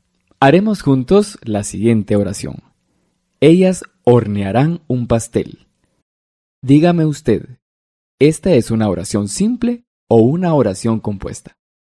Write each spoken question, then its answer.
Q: Dígame usted, ¿esta es una oración simple o una oración compuesta?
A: Así es, esta es una oración simple, con un sujeto y un predicado.